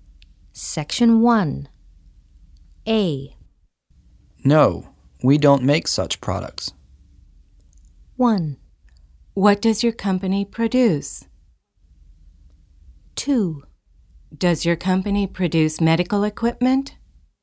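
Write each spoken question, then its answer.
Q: Find the correct question or statement.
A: 2: Does your company produce medical equipment?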